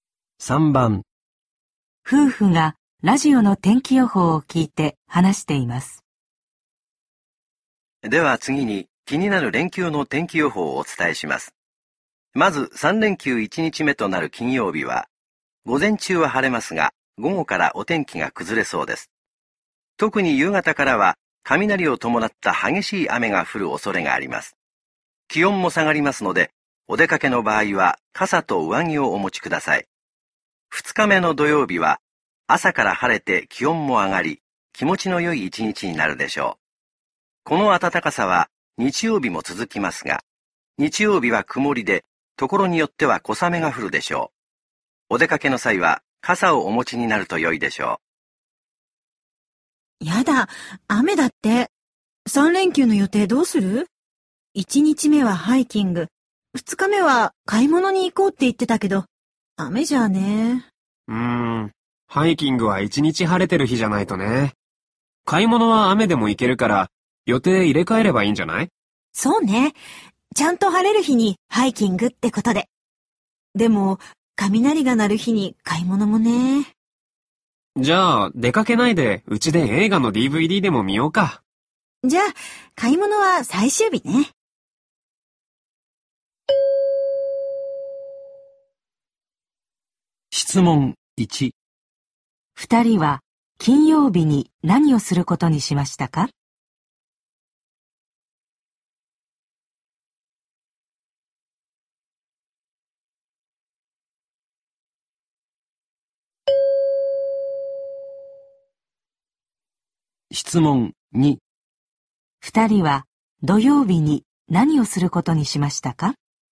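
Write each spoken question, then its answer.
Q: 二人は金曜日に何をすることにしましたか?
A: 家で映画のDVDを見る

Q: 二人は土曜日に何をすることにしましたか?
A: ハイキング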